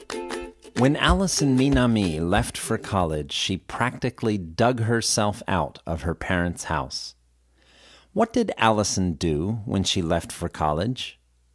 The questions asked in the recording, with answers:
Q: What did Allison do when she left for college?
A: When Allison left for college, she practically dug herself out of her parents' house.